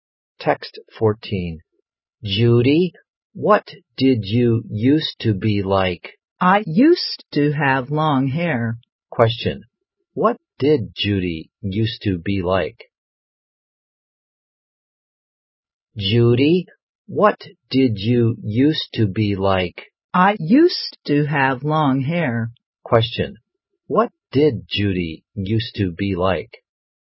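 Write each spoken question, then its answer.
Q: What did Judy used to be like?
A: She used to have long hair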